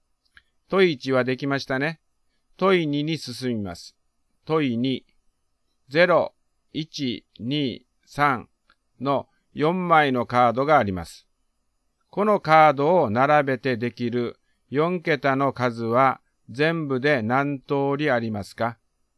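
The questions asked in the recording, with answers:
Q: 0、1、2、3の4枚のカードがあります。このカードを並べてできる4桁の数は全部で何通りありますか?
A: 18通り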